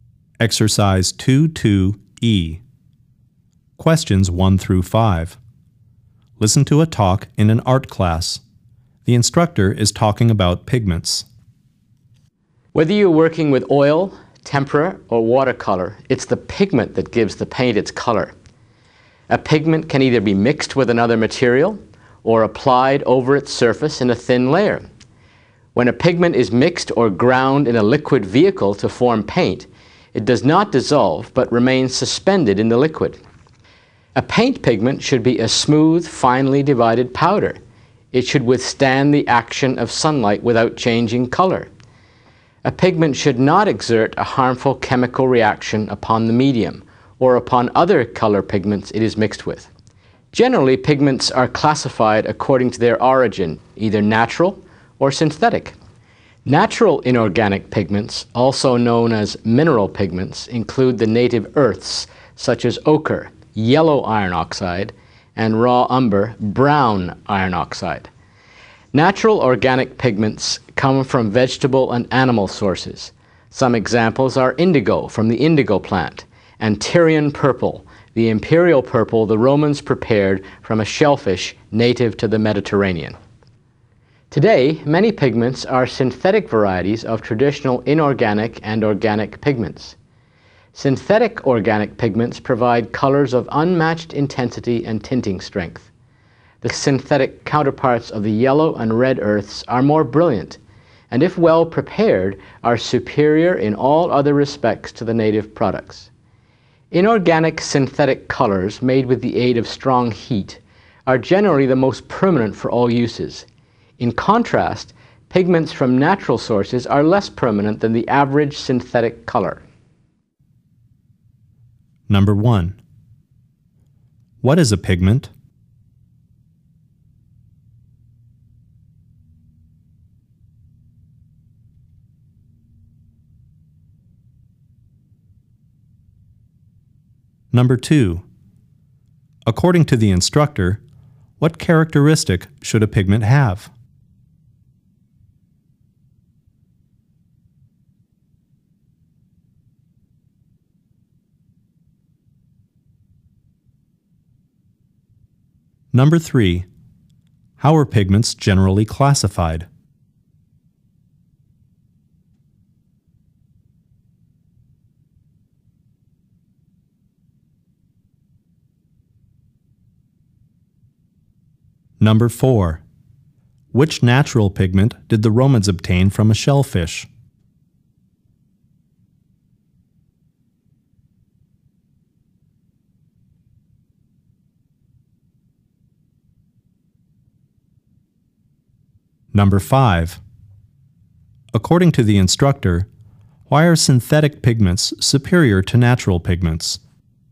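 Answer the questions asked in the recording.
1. The substance that gives paint its color
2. It should withstand sunlight without changing color
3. By origin: natural or synthetic
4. Tyrian purple
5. They are more brilliant and more permanent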